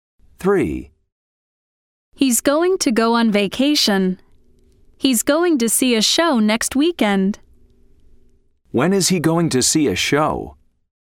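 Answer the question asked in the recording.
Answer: next weekend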